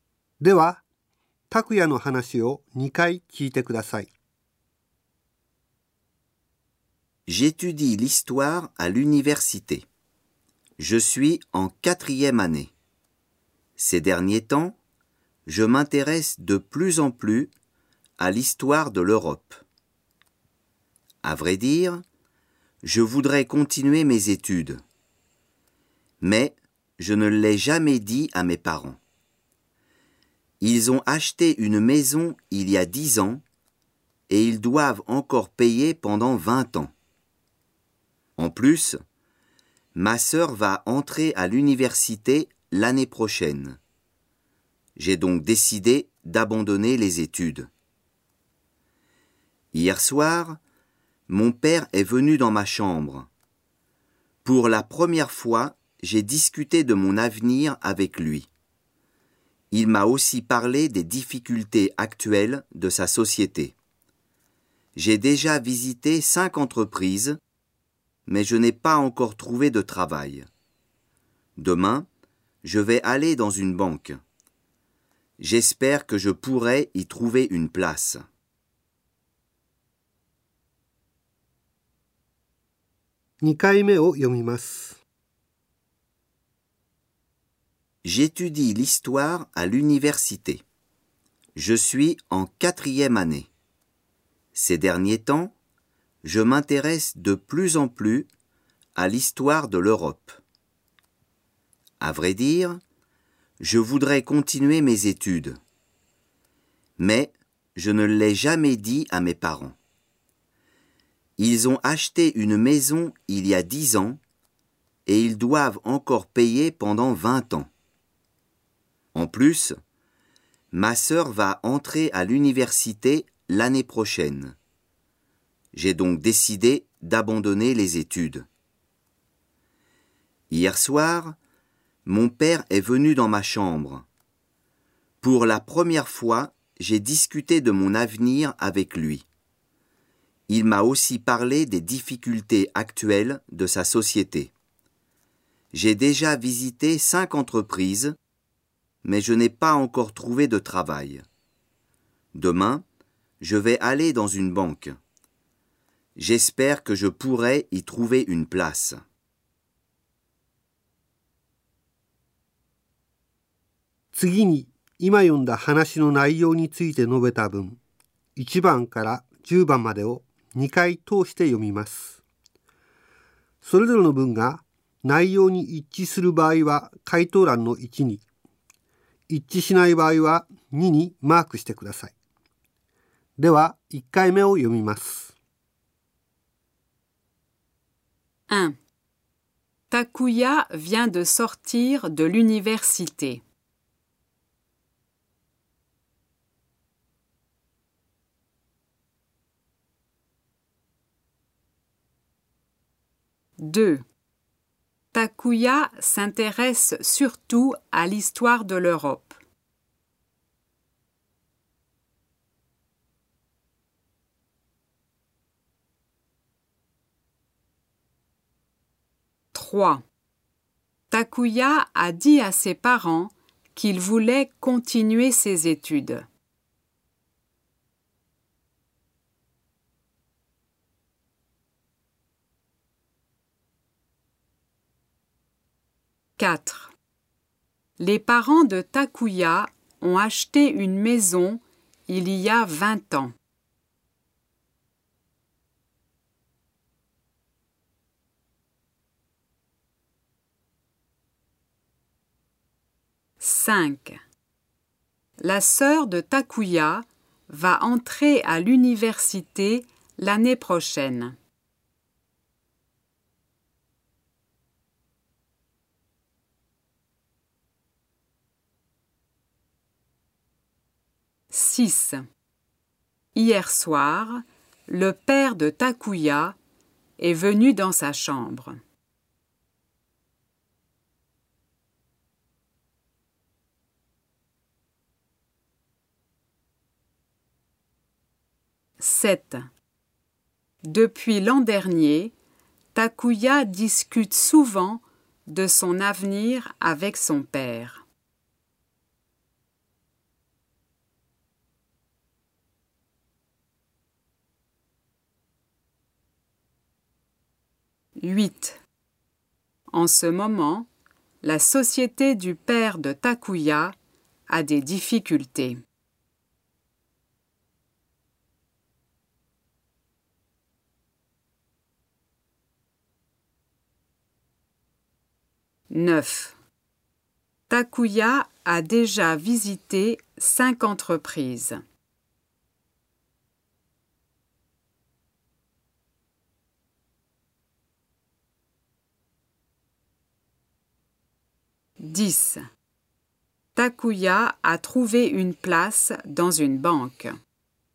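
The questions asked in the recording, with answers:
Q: Takuya vient de sortir de l'université.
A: Faux

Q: Takuya s'intéresse surtout à l'histoire de l'Europe.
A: Vrai

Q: Takuya a dit à ses parents qu'il voulait continuer ses études.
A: Faux

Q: Les parents de Takuya ont acheté une maison il y a 20 ans.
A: Faux

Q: La sœur de Takuya va entrer à l'université l'année prochaine.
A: Vrai

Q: Hier soir, le père de Takuya est venu dans sa chambre.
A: Vrai

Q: Depuis l'an dernier, Takuya discute souvent de son avenir avec son père.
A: Faux

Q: En ce moment, la société du père de Takuya a des difficultés.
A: Vrai

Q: Takuya a déjà visité 5 entreprises.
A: Vrai

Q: Takuya a trouvé une place dans une banque.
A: Faux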